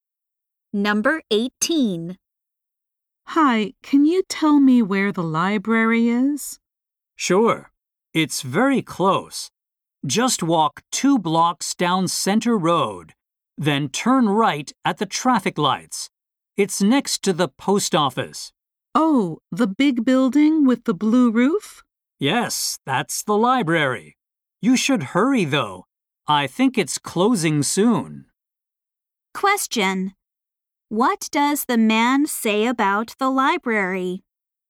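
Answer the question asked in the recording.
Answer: It is closing soon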